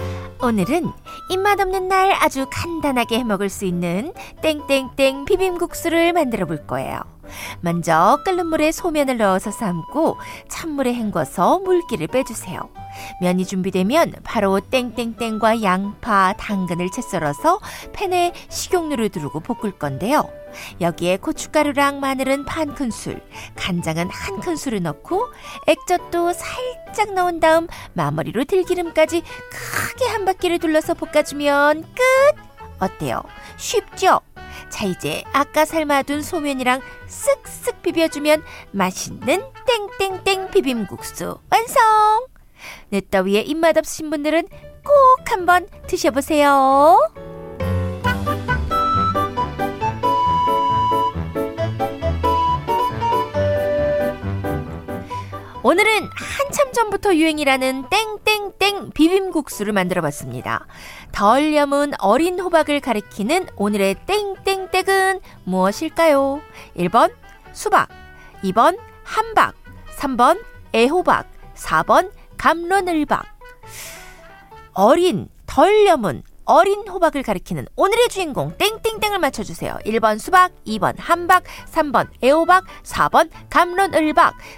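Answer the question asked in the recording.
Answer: 3: 애호박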